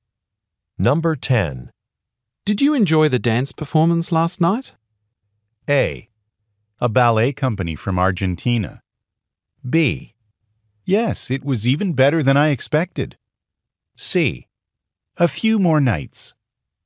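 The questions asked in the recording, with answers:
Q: Did you enjoy the dance performance last night?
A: B: Yes, it was even better than I expected.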